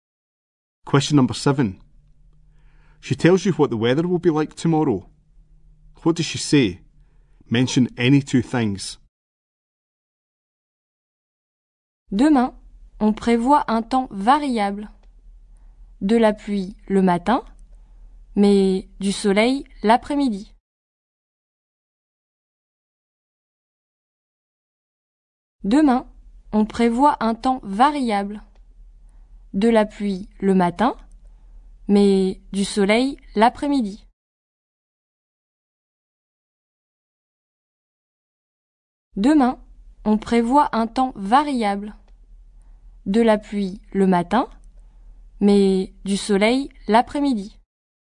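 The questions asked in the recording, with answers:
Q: She tells you what the weather will be like tomorrow. What does she say? Mention any two things.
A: Changeable weather; rain in the morning; sun in the afternoon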